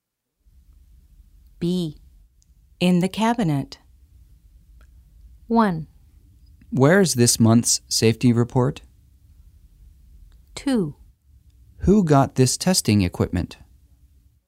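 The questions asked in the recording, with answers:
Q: In the cabinet.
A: 1: Where is this month's safety report?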